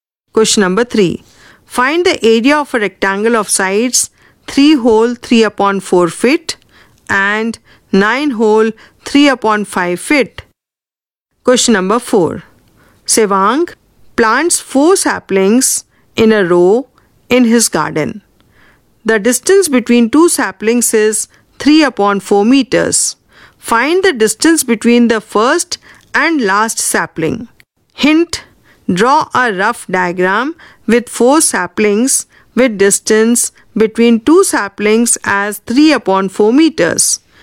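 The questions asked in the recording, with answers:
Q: Find the distance between the first and last sapling.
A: 9/4 meters (2 1/4 m)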